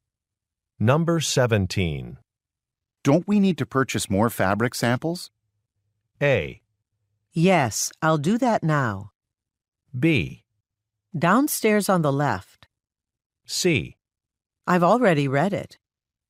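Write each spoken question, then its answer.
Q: Don't we need to purchase more fabric samples?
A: A: Yes, I'll do that now.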